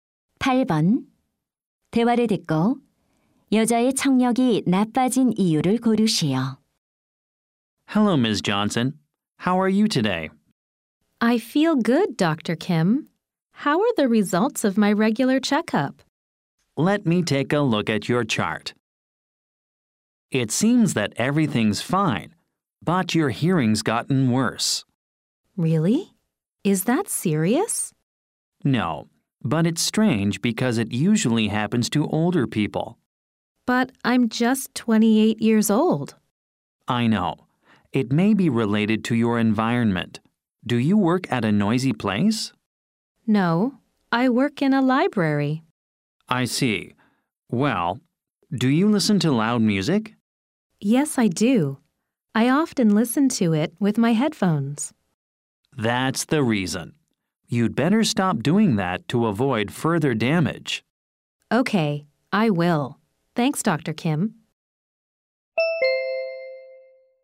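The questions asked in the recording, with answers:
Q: 대화를 듣고 여자의 청력이 나빠진 이유를 고르시오.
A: 헤드폰으로 시끄러운 음악을 자주 들어서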